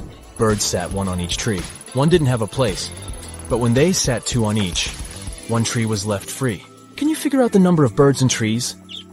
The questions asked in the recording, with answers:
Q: Can you figure out the number of birds and trees?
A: Four birds and three trees.